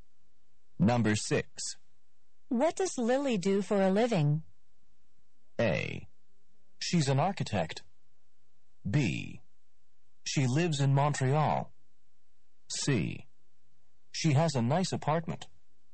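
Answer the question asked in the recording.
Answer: A: She's an architect.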